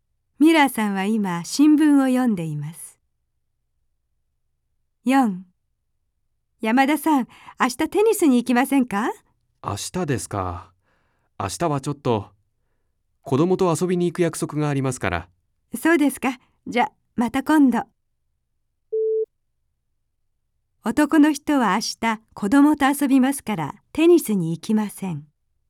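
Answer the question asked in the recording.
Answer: ○(正しい)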